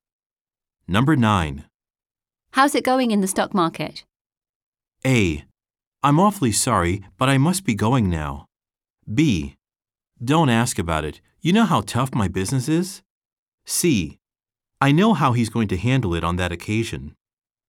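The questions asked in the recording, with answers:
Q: How's it going in the stock market?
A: B: Don't ask about it. You know how tough my business is?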